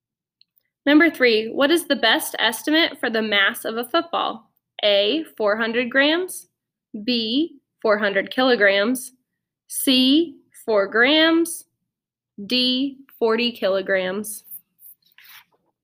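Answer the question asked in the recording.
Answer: A: 400 grams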